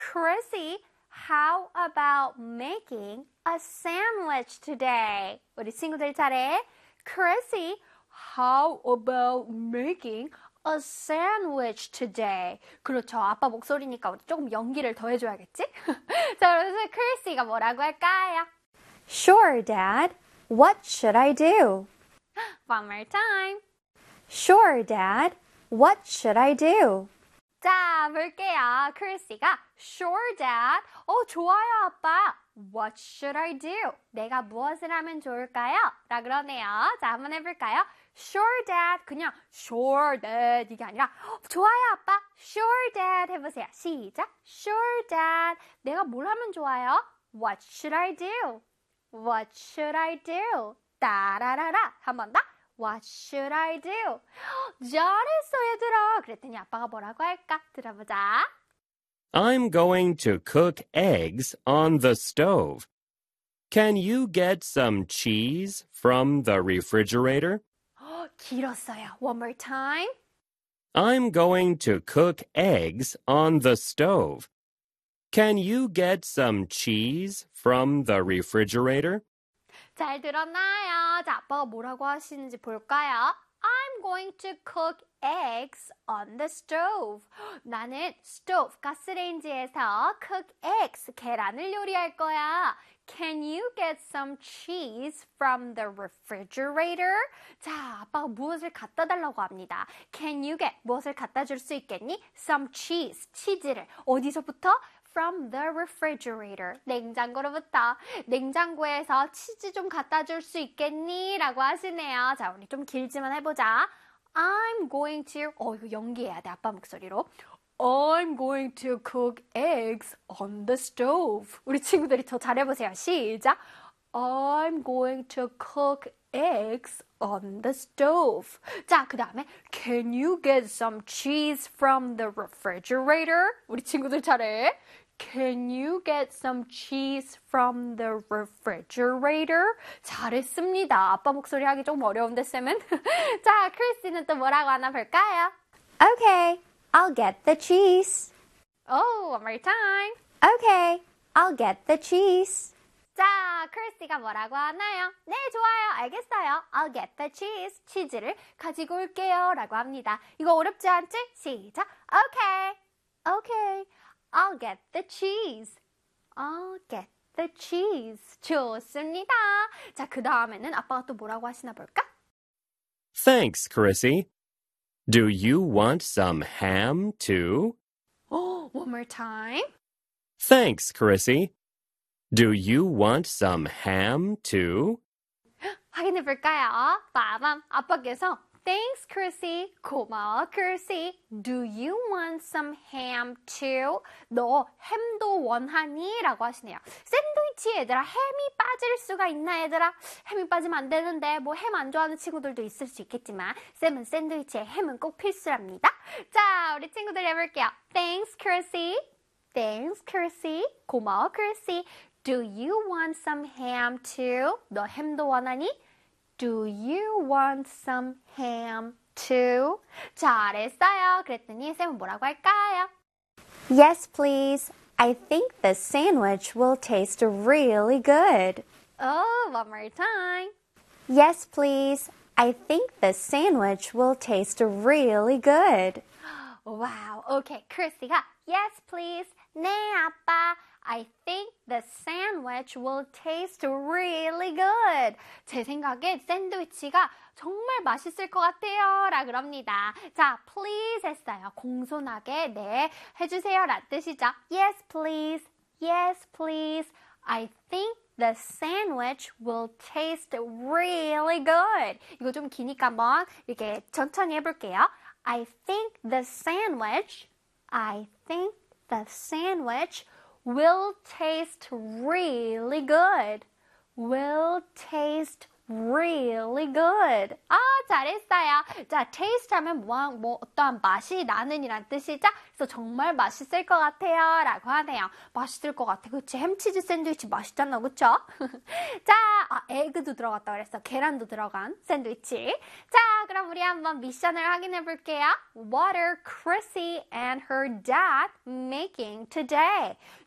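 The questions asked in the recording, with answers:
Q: What are Chrissy and her dad making today?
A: A sandwich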